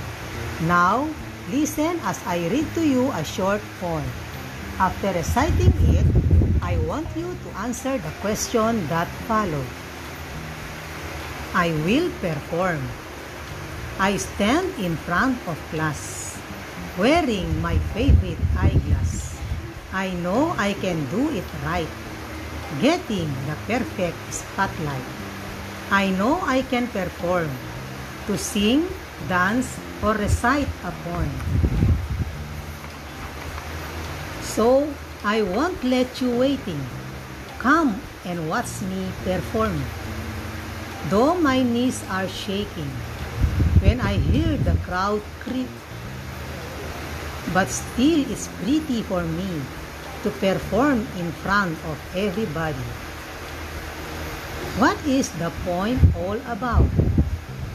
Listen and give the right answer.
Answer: It is about how the author performed in front of the crowd.